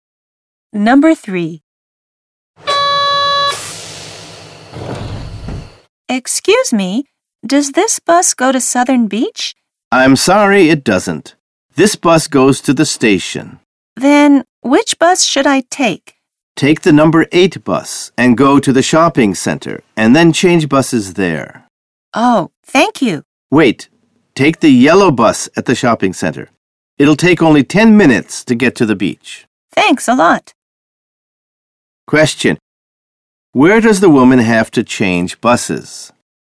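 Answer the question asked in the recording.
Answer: At the shopping center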